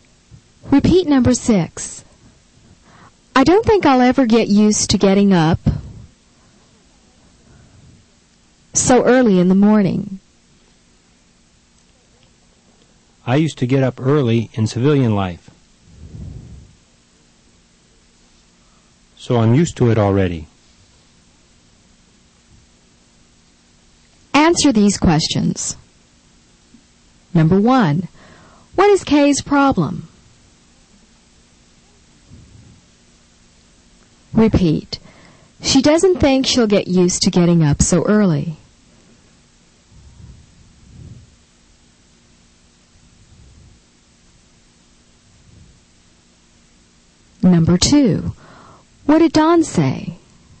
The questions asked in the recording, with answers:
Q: what is Kay's problem?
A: she doesn't think she'll get used to getting up so early.

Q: what did Don say?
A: he used to get up early in civilian life,